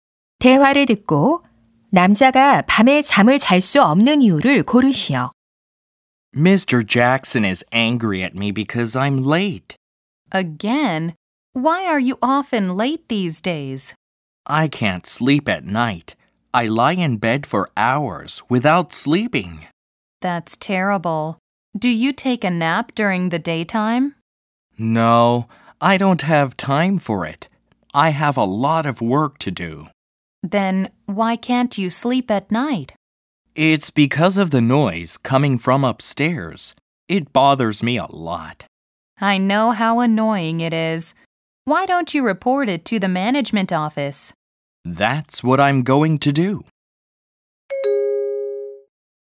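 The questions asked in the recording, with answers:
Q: 대화를 듣고 남자가 밤에 잠을 잘 수 없는 이유를 고르시오.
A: 위층에서 나는 소음 때문에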